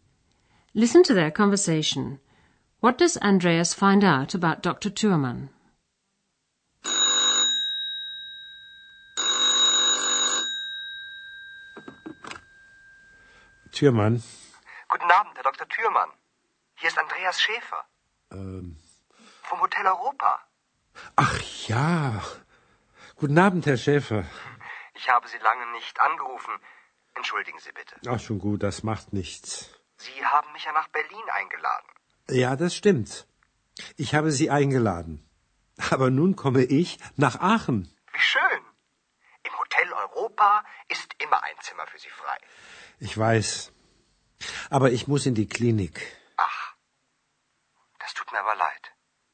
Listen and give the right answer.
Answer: First of all, that Dr. Thürmann is coming to Aachen, and secondly, that he has to go to a clinic.